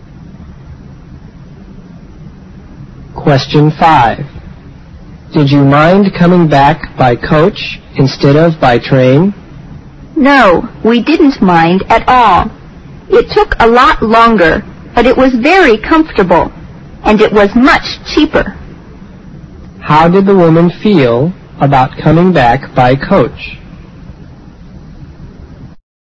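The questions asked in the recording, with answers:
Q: How did the woman feel about coming back by coach?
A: She didn't mind; it was comfortable and cheaper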